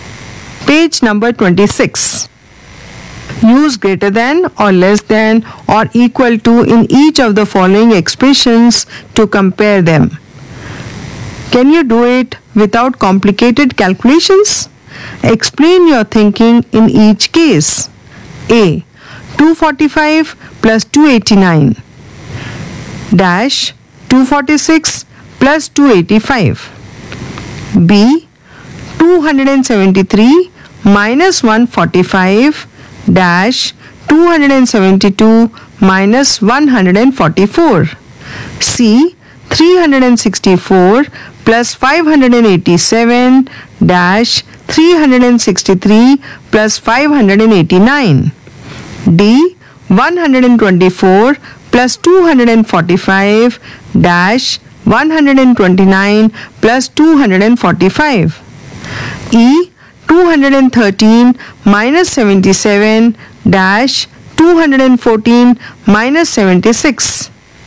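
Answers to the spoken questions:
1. greater than
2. equal to
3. less than
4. less than
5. less than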